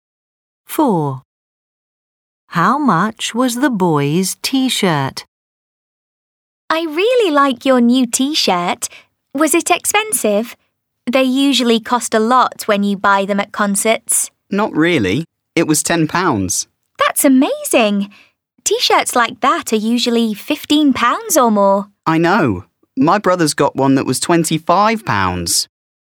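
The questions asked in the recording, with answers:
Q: How much was the boy's T-shirt?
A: £10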